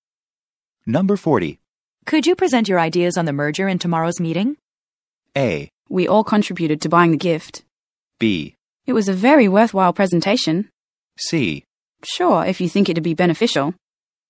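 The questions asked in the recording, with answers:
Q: Could you present your ideas on the merger in tomorrow's meeting?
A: C: Sure, if you think it'd be beneficial.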